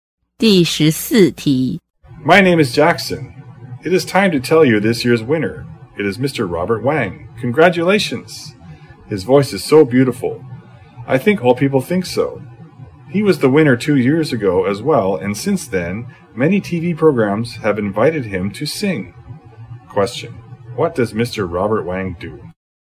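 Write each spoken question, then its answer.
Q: What does Mr. Robert Wang do?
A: He is a singer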